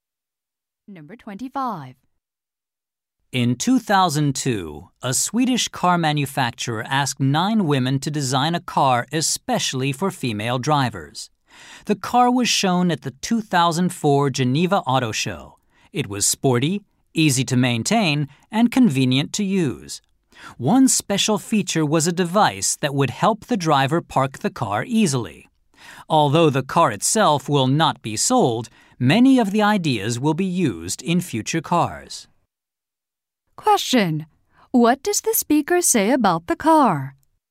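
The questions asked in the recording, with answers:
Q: What does the speaker say about the car?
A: It will not be sold, but its ideas will be used in future cars.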